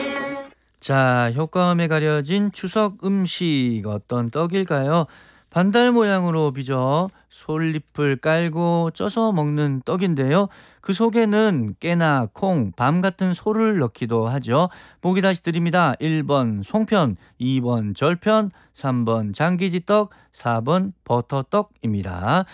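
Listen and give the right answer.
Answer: 1번: 송편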